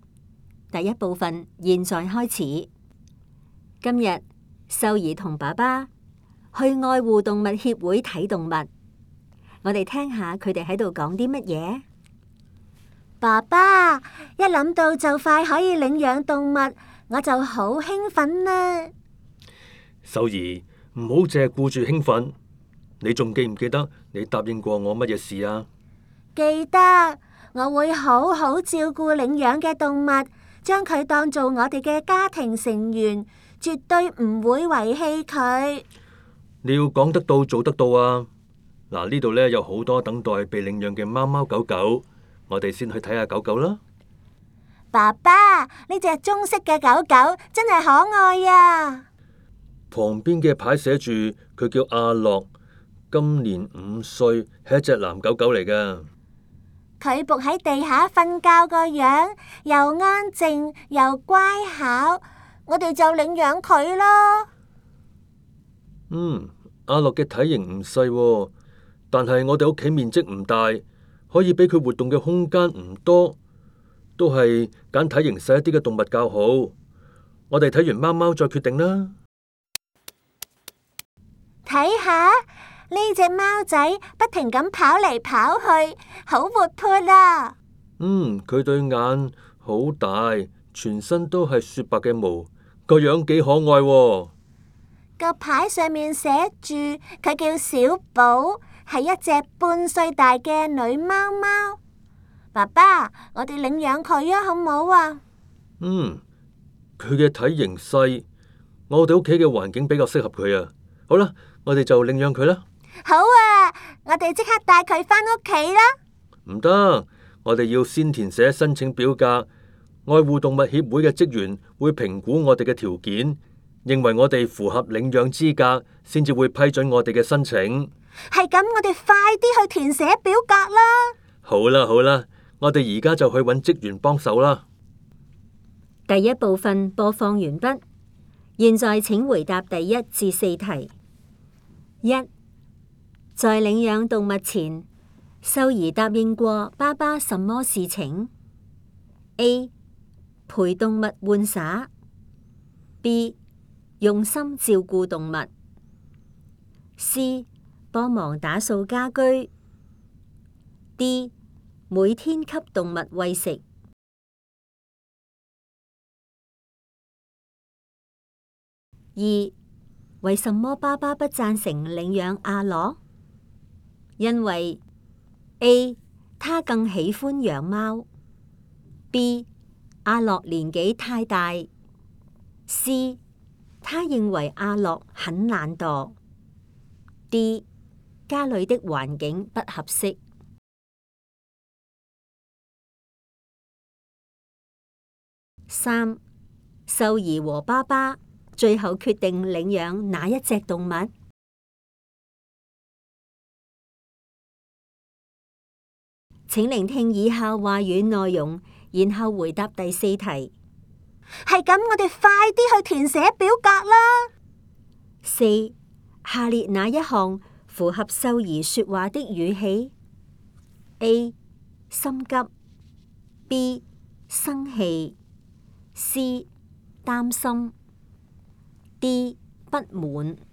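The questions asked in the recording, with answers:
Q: 在领养动物前,秀儿答应过爸爸什么事情?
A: B: 用心照顾动物

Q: 为什么爸爸不赞成领养阿乐?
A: D: 家里的环境不合适

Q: 秀儿和爸爸最后决定领养哪一只动物?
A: 小宝(白色的小猫)

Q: 下列哪一项符合秀儿说话的语气?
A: A: 心急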